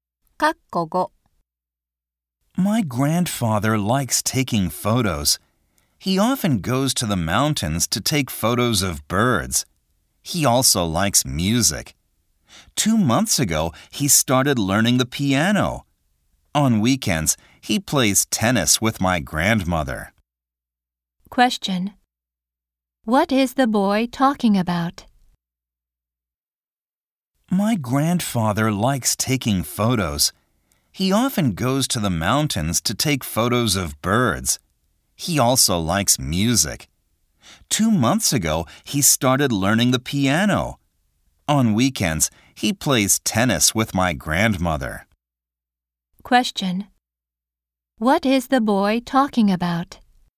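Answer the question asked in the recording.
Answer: His grandfather's hobbies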